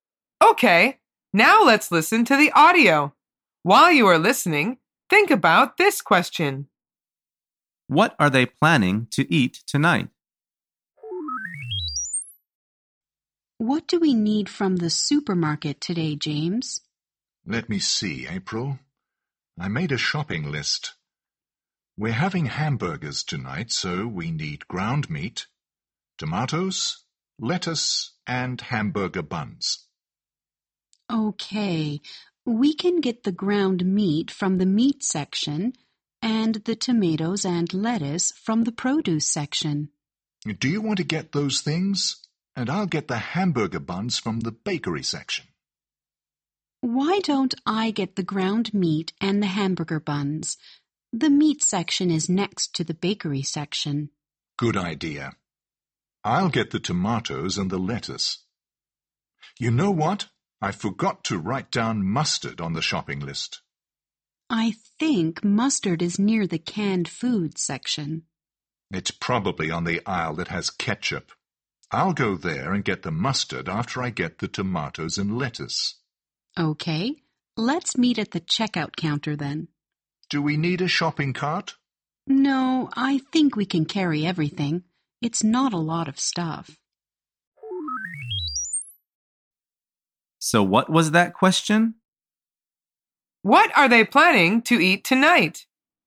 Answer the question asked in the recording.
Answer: The answer is hamburgers.